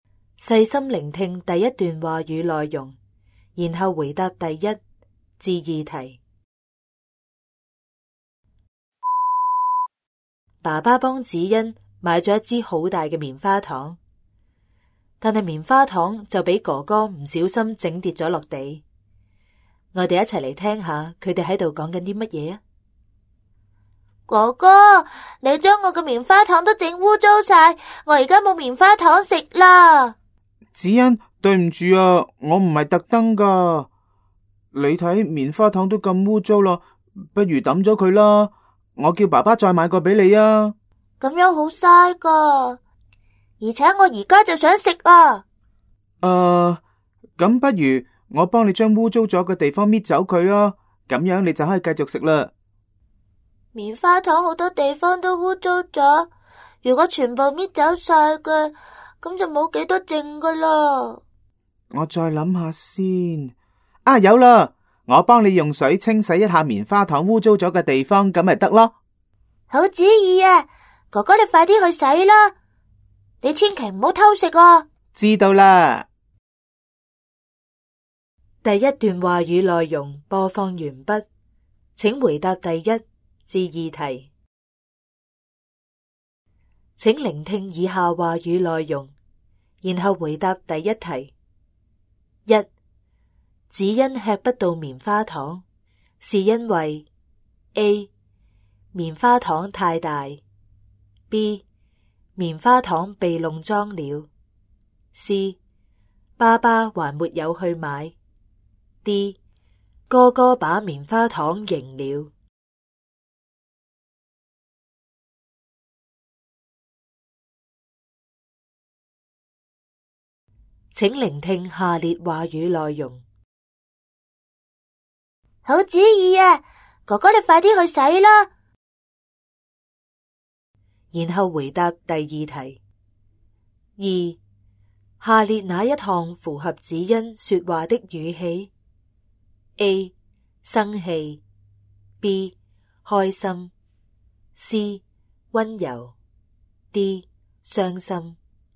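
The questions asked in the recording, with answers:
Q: 子欣吃不到棉花糖,是因为 A. 棉花糖太大 ;B. 棉花糖被弄脏了 ;C. 爸爸还没有去买 ;D. 哥哥把棉花糖赢了。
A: B: 棉花糖被弄脏了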